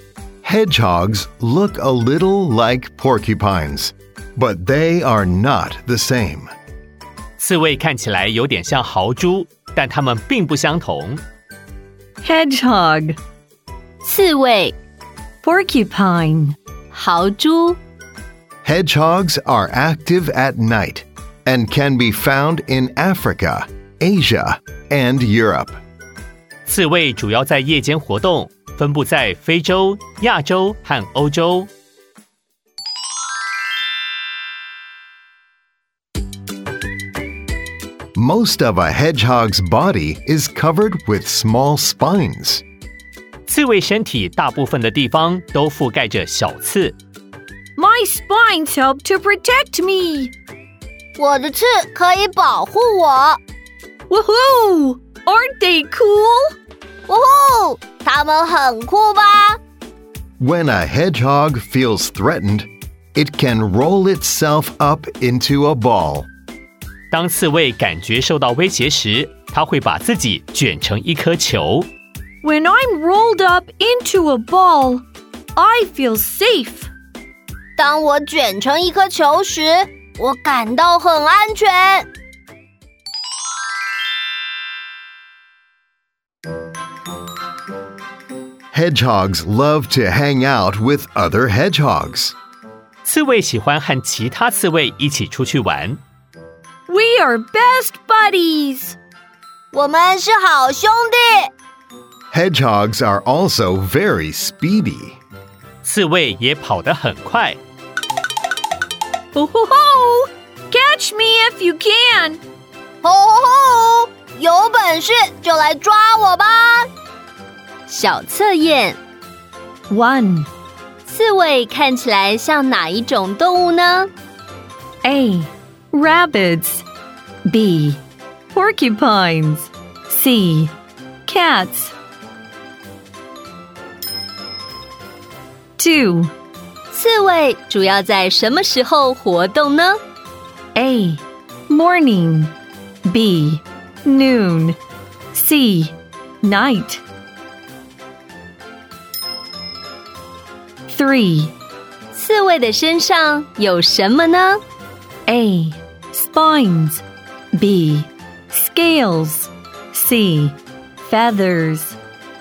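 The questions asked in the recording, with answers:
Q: 刺猬看起来像哪一种动物呢?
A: B: Porcupines

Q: 刺猬主要在什么时候活动呢?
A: C: Night

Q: 刺猬的身上有什么呢?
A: A: Spines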